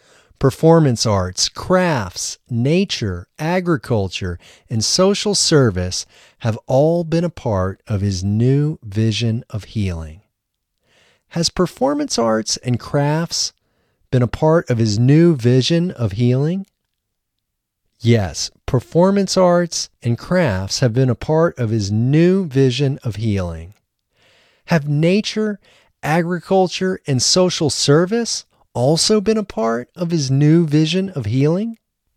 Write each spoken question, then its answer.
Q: Has performance arts and crafts been a part of his new vision of healing?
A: Yes, performance arts and crafts have been a part of his new vision of healing.

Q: Have nature, agriculture, and social service also been a part of his new vision of healing?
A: Yes, nature, agriculture, and social service have also been a part of his new vision of healing.